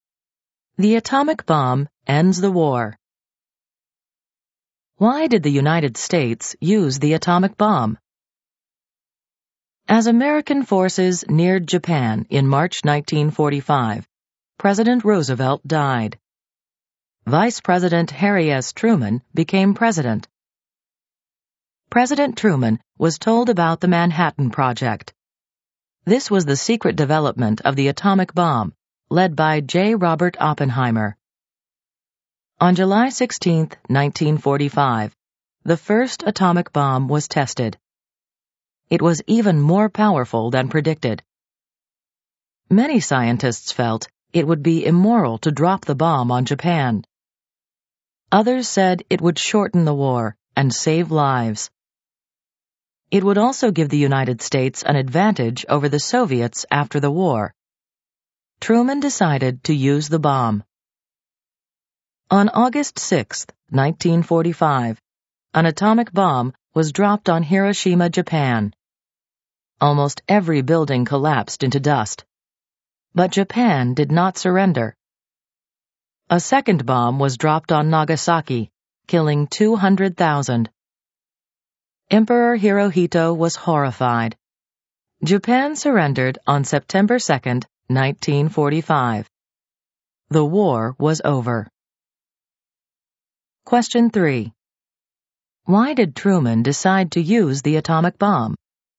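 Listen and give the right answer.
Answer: To shorten the war, save lives, and gain an advantage over the Soviets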